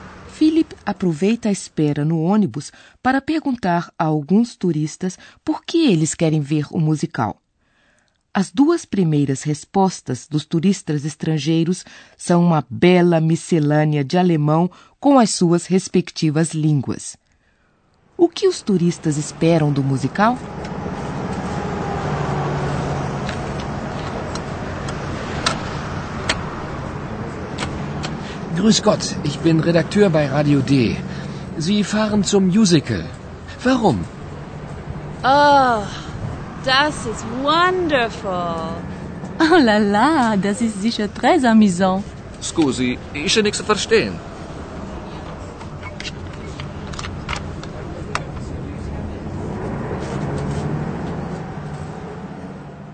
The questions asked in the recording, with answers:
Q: O que os turistas esperam do musical?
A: As expectativas dos turistas são positivas.